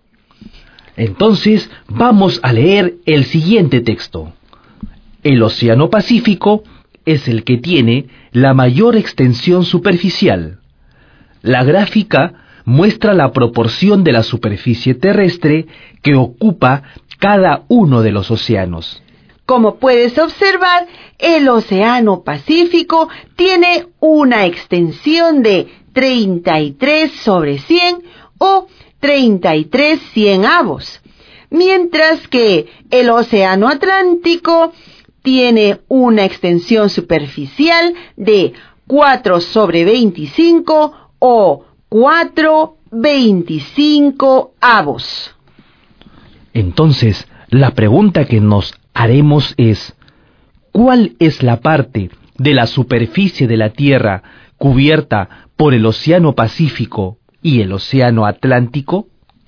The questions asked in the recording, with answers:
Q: ¿cuál es la parte de la superficie de la Tierra cubierta por el Océano Pacífico y el Océano Atlántico?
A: La parte de la Tierra cubierta por los océanos Pacífico y Atlántico es